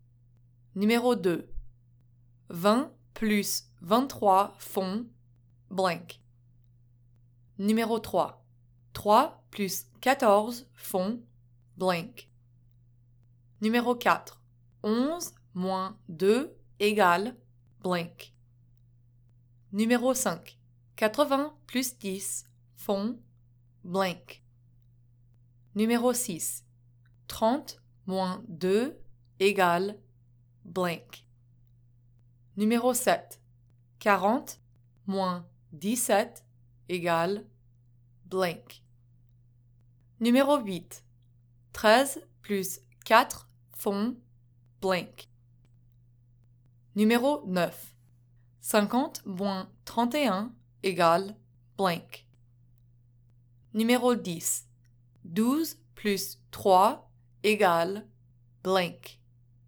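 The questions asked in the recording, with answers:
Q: 20 plus 23 font blank.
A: 43

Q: 3 plus 14 font blank.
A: 17

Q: 80 plus 10 font blank.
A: 90

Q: 30 moins 2 égale blank.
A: 28

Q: 40 moins 17 égale blank.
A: 23

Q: 13 plus 4 font blank.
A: 17

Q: 50 moins 31 égale blank.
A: 19

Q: 12 plus 3 égale blank.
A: 15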